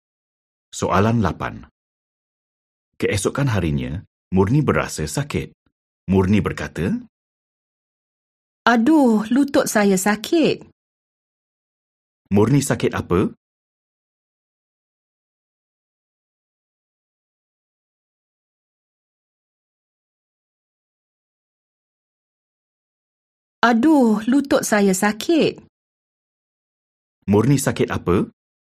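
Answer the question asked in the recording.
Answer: sakit lutut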